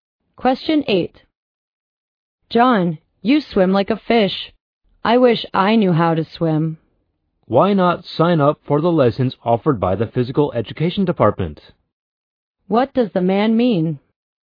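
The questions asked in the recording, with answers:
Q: What does the man mean?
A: The woman should sign up for swimming lessons.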